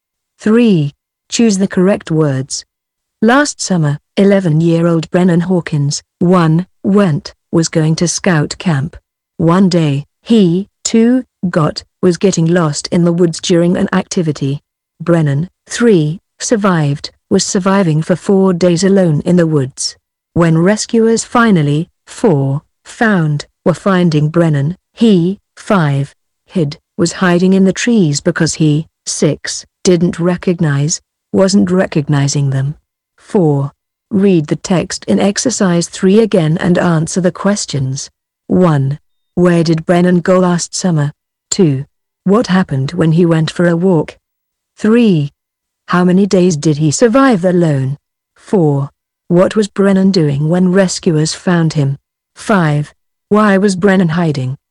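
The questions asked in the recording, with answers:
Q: Where did Brennan go last summer?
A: To scout camp

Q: What happened when he went for a walk?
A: He got lost in the woods

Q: How many days did he survive alone?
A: 4 days

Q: What was Brennan doing when rescuers found him?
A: He was hiding in the trees

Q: Why was Brennan hiding?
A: Because he didn't recognize the rescuers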